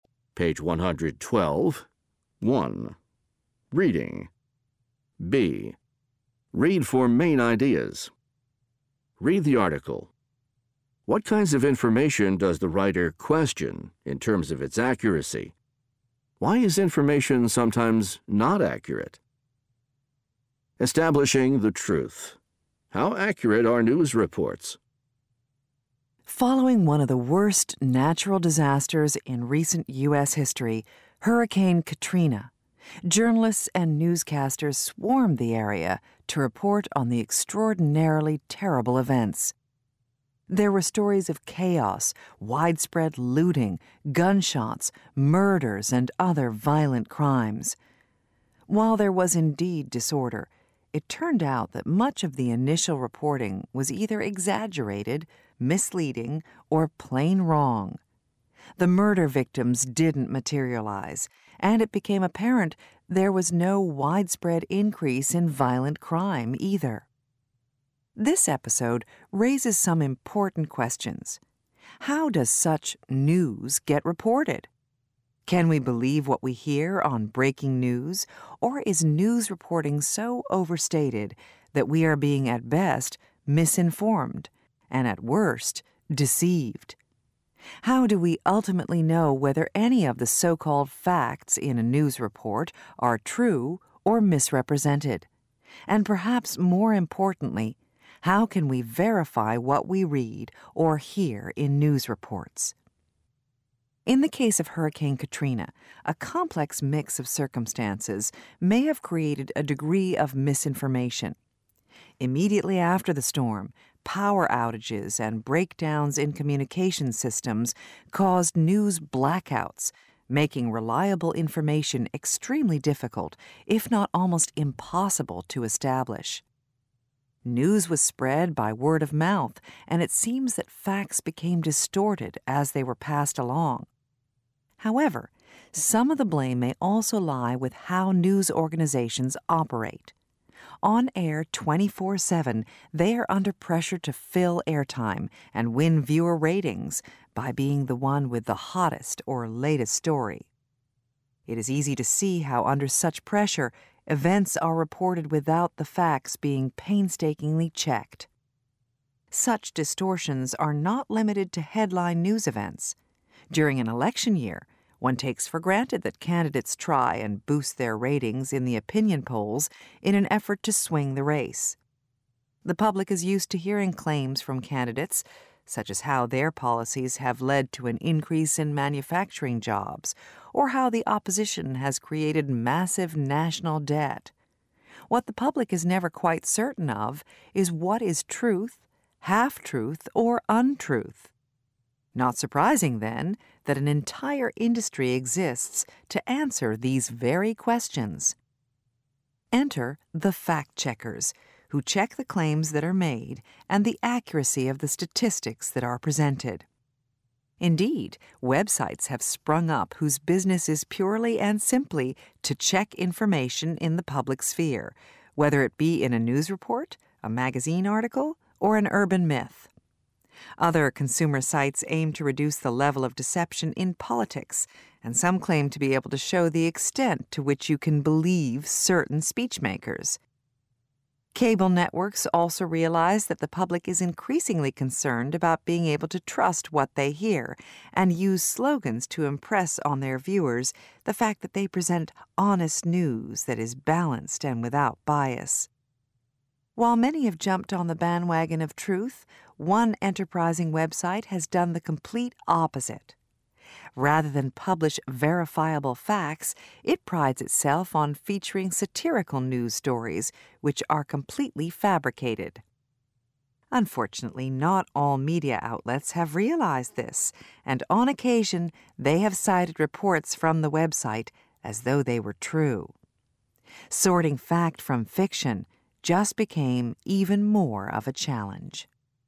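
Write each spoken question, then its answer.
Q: What kinds of information does the writer question in terms of its accuracy?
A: News reports (e.g. breaking news on Hurricane Katrina) and claims made by election candidates

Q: Why is information sometimes not accurate?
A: Communication breakdowns and word of mouth distort facts, news organizations rush stories to fill airtime and win ratings without checking facts, and candidates exaggerate claims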